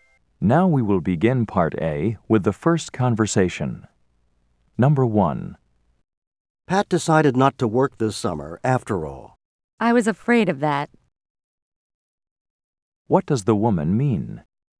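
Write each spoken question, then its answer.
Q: What does the woman mean?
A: She expected that Pat wouldn't work this summer.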